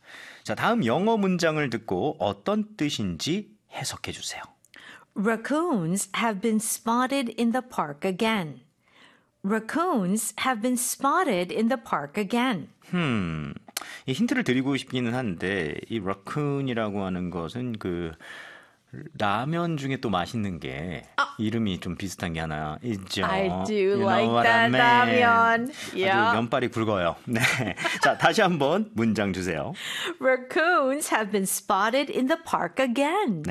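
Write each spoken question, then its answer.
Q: 자, 다음 영어 문장을 듣고 어떤 뜻인지 해석해 주세요.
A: 공원에서 너구리들이 또 목격되었습니다.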